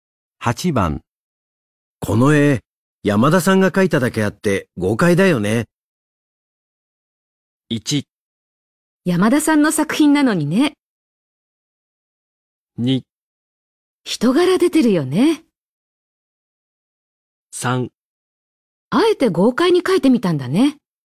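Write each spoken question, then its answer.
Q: この絵、山田さんが描いただけあって豪快だよね。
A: 2: 人柄出てるよね。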